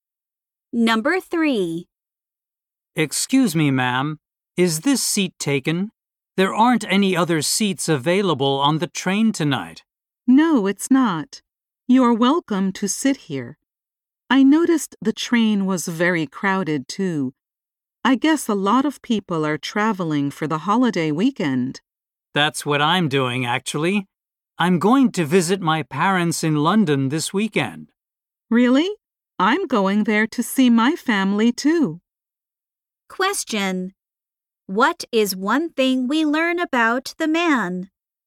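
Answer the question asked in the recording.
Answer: He is going to London to visit his parents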